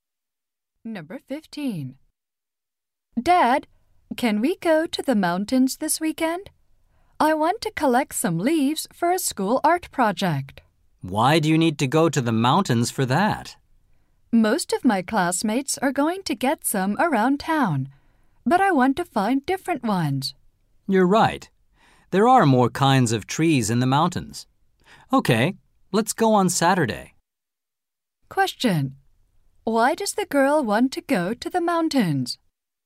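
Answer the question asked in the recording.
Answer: To find different kinds of leaves for a school art project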